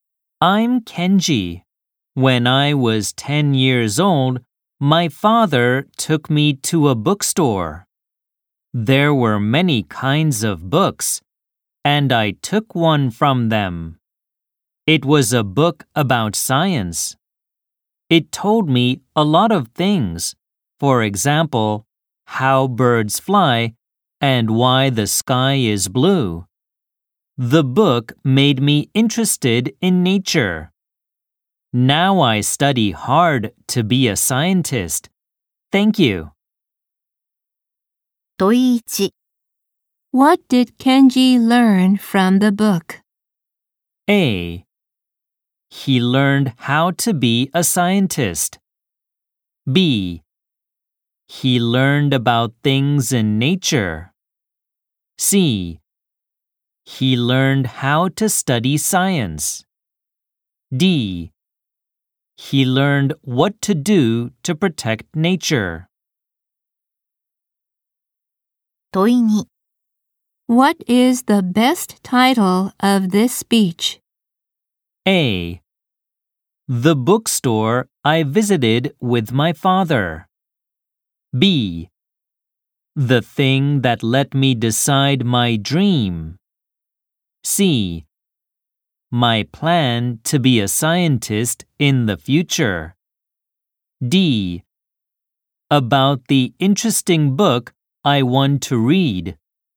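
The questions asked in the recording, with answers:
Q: What did Kenji learn from the book?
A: B: He learned about things in nature.

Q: What is the best title of this speech?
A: B: The thing that let me decide my dream.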